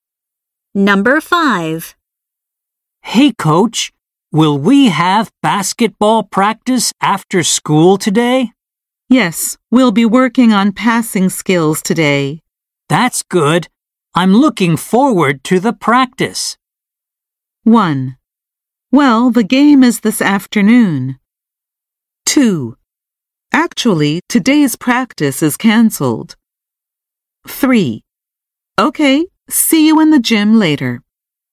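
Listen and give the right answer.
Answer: 3: Okay. See you in the gym later.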